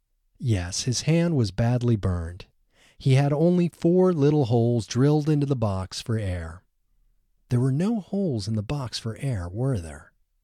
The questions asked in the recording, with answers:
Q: There were no holes in the box for air, were there?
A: No, there were 4 holes in the box.